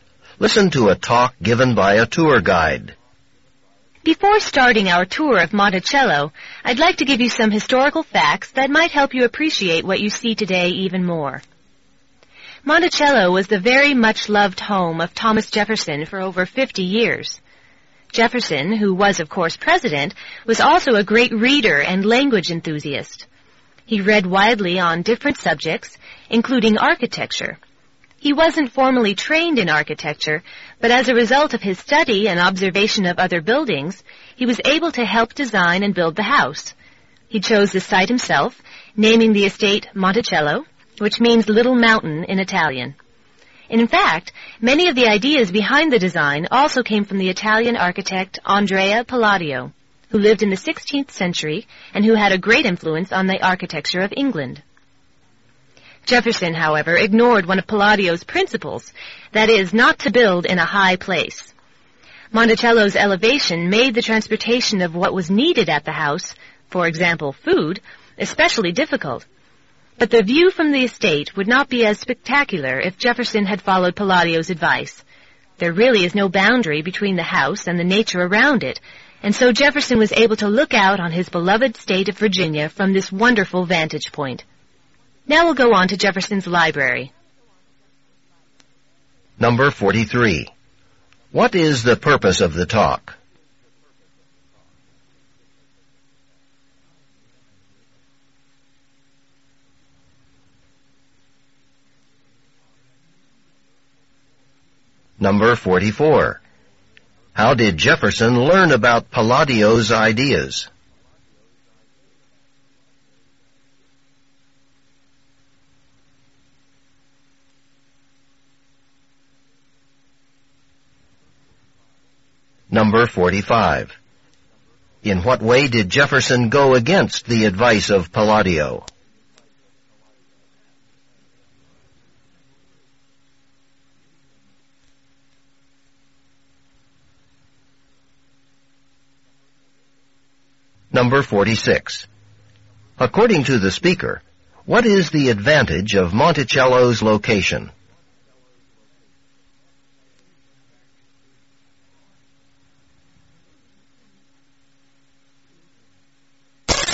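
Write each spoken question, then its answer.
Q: What is the purpose of the talk?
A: To give historical background on Monticello before the tour

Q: In what way did Jefferson go against the advice of Palladio?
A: He built the house in a high place

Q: According to the speaker, what is the advantage of Monticello's location?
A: It has a spectacular view of Virginia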